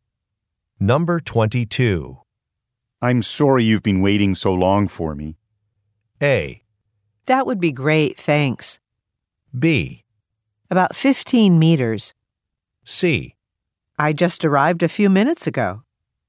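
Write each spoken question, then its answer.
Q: I'm sorry you've been waiting so long for me.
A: C: I just arrived a few minutes ago.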